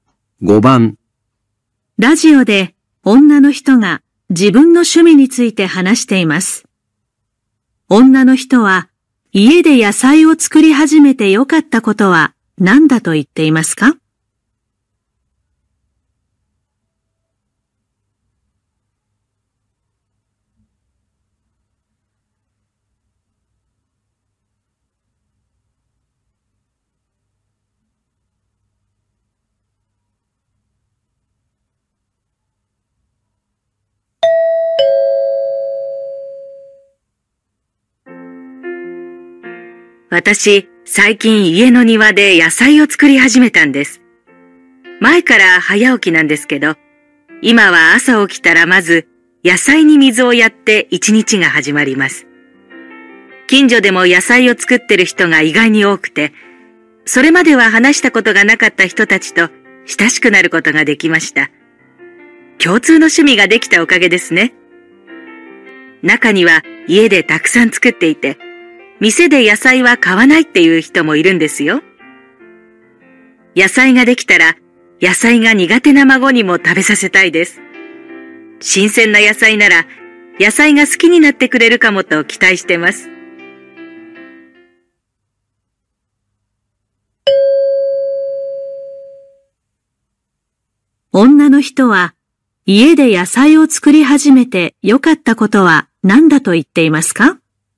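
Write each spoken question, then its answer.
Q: 女の人は、家で野菜を作り始めて良かったことは何だと言っていますか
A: 近所の人と親しくなれたこと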